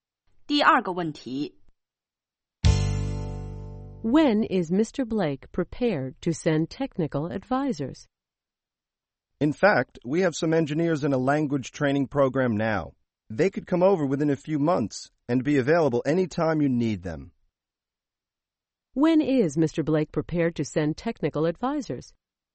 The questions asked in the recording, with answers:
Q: When is Mr. Blake prepared to send technical advisors?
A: The engineers are in a language training program now, and they'll be available within a few months.